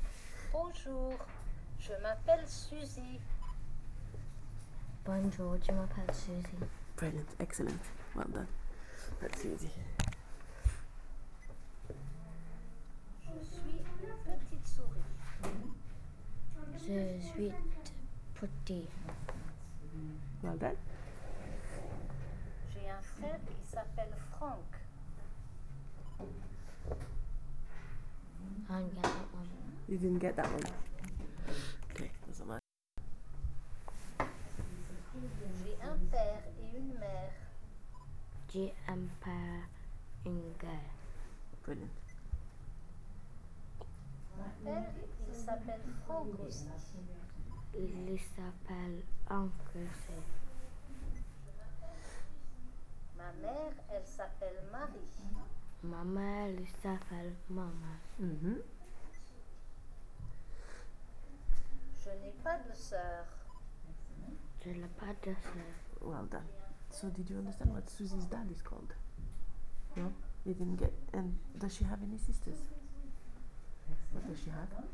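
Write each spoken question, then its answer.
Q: So did you understand what Susie's dad is called?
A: Franck

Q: And does she have any sisters?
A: No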